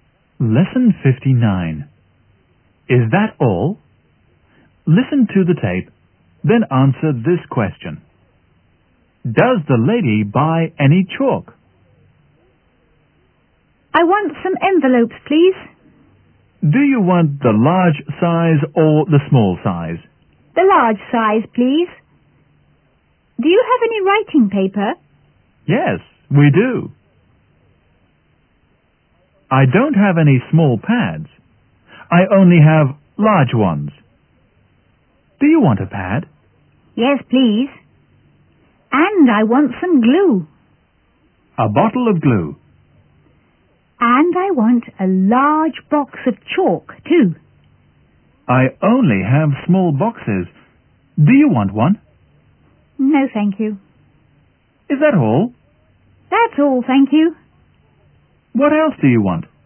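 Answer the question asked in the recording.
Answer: No, she doesn't.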